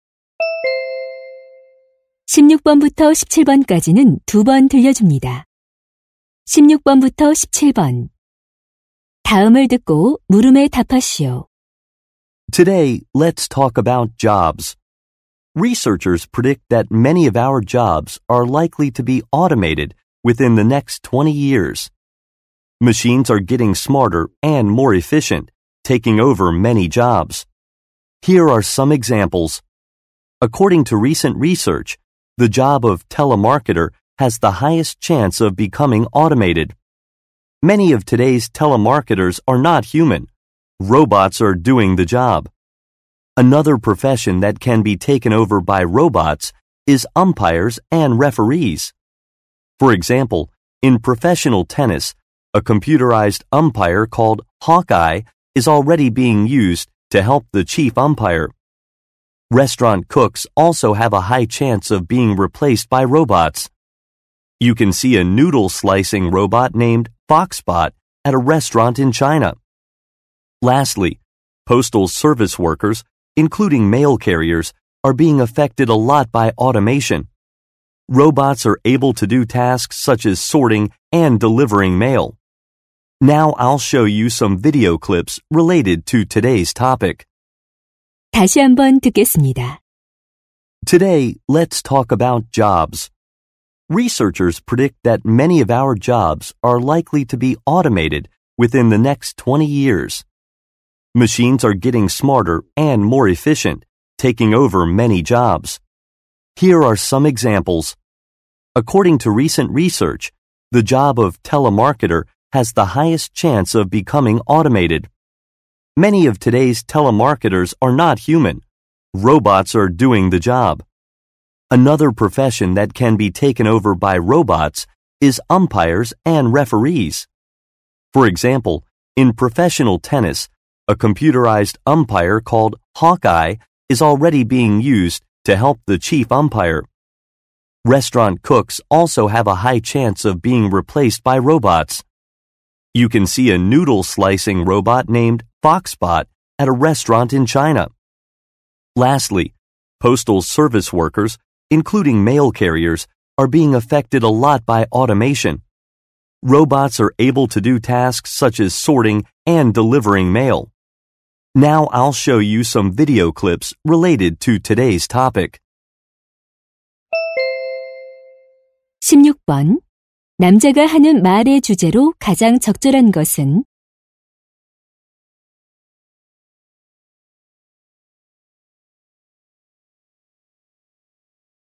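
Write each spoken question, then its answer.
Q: 남자가 하는 말의 주제로 가장 적절한 것은?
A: 자동화로 인해 로봇에게 대체될 가능성이 높은 직업들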